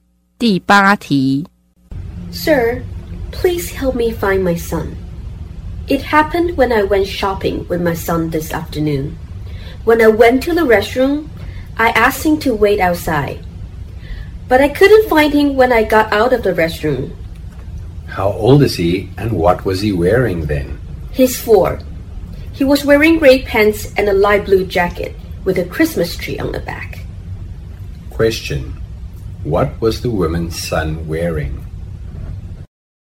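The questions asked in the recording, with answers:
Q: what was the woman's son wearing?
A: Gray pants and a light blue jacket with a Christmas tree on the back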